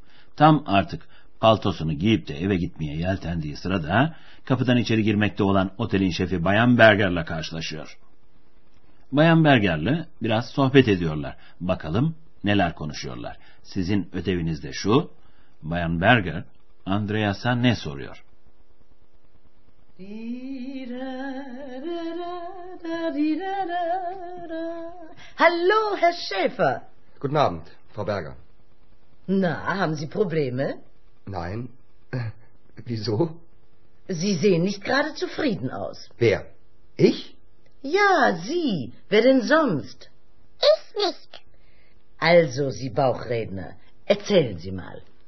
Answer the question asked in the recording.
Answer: Bayan Berger, Andreas'a bir problem, bir sorun olup olmadığını soruyordu.